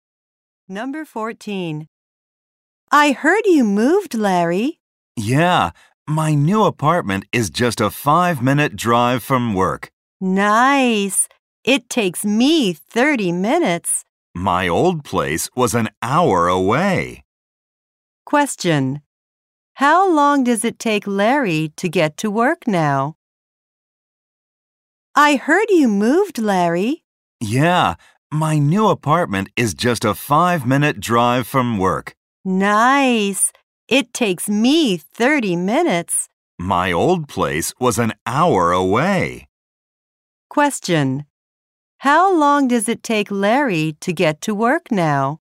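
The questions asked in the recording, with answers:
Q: Question. How long does it take Larry to get to work now?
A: 5 minutes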